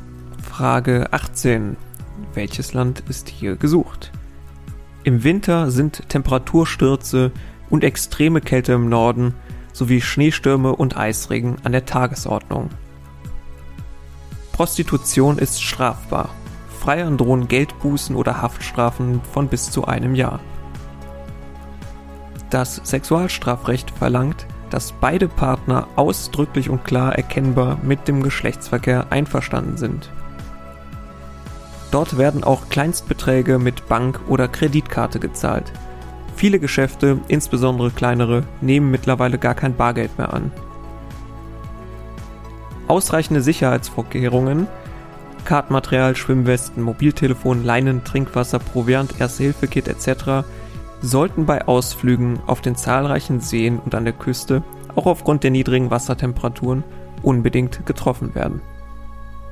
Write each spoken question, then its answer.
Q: Welches Land ist hier gesucht?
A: Hier war Schweden gesucht.